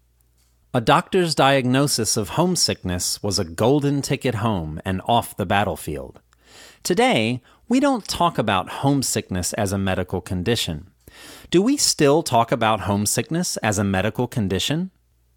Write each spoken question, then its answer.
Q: Do we still talk about homesickness as a medical condition?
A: No, we don't still talk about homesickness as a medical condition.